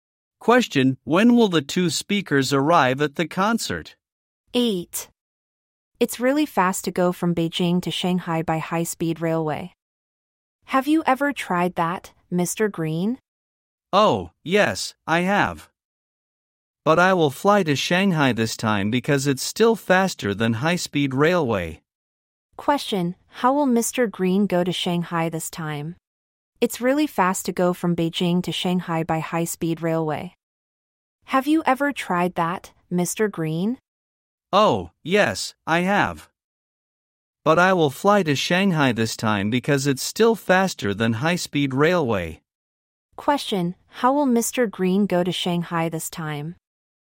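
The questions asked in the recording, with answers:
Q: Question, how will Mr. Green go to Shanghai this time?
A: By plane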